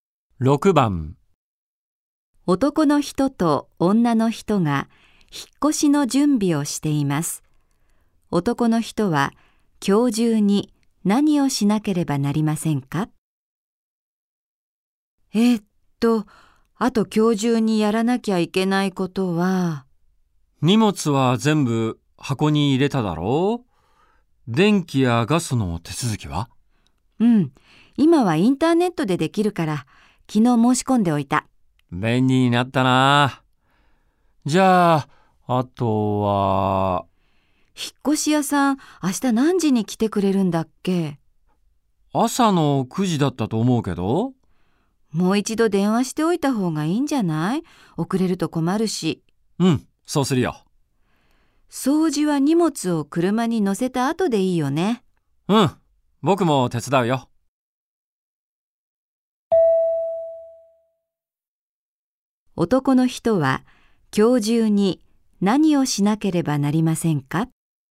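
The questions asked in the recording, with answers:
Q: 男の人は今日中に何をしなければなりませんか?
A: 引っ越し屋さんに電話する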